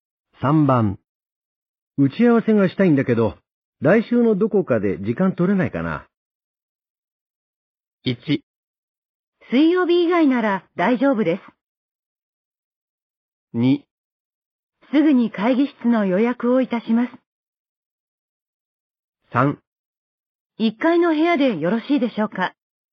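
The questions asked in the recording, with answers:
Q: 打ち合わせがしたいんだけど、来週のどこかで時間取れないかな。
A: 1: 水曜日以外なら大丈夫です。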